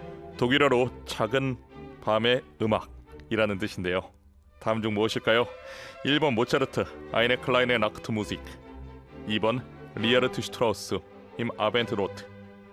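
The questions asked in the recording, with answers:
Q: 독일어로 작은 밤의 음악이라는 뜻인데요. 다음 중 무엇일까요?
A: 1번: 모차르트, 아이네 클라인의 낙트 무직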